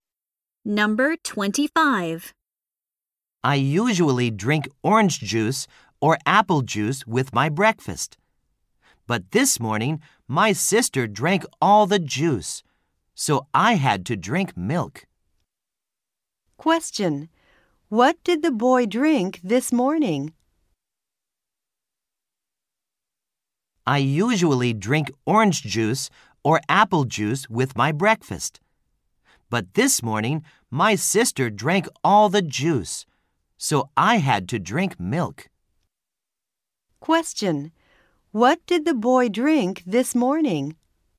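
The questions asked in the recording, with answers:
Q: What did the boy drink this morning?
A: Milk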